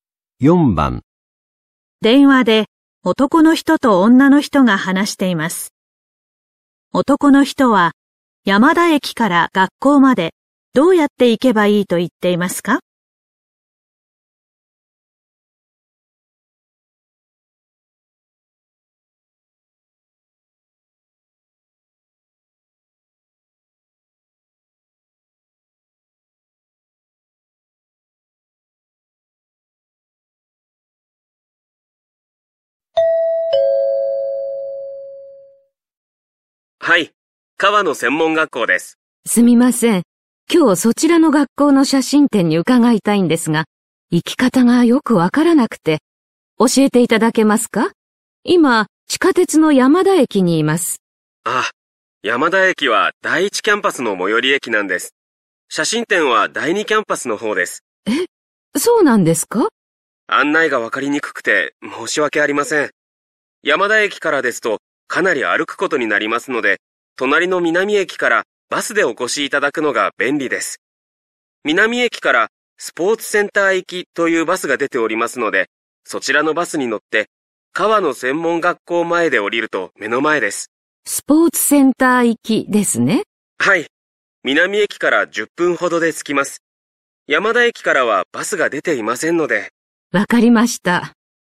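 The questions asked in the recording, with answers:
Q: 男の人は、山田駅から学校までどうやって行けばいいと言っていますか?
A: 隣の南駅まで行って、スポーツセンター行きのバスに乗る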